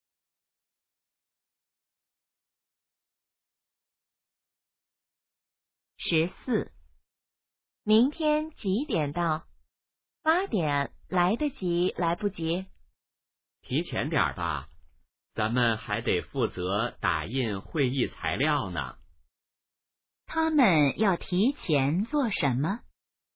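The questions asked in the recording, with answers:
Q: 他们要提前做什么?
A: 打印会议材料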